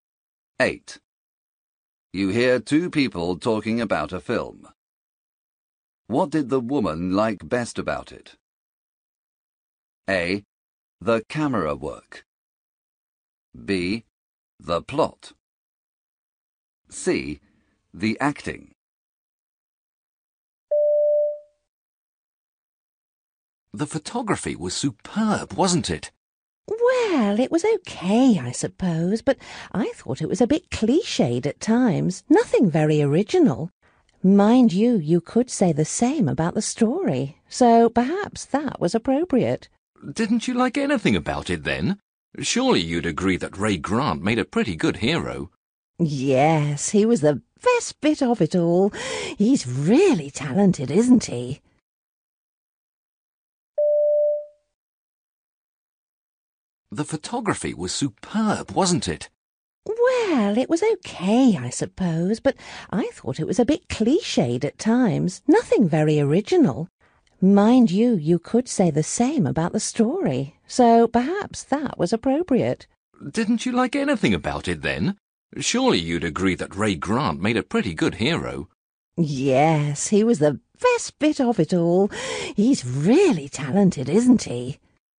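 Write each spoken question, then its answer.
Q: What did the woman like best about it?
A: C: The acting.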